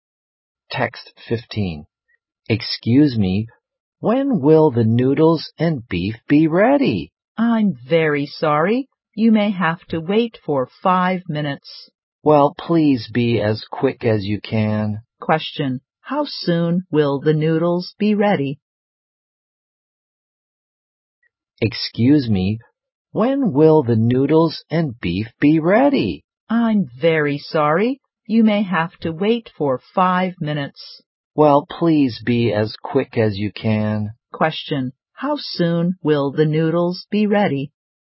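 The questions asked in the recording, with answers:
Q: How soon will the noodles be ready?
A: In 5 minutes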